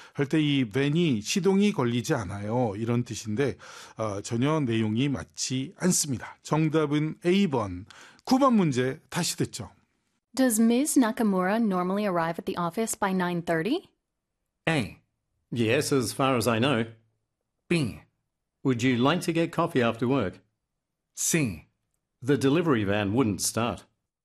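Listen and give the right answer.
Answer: A: Yes, as far as I know.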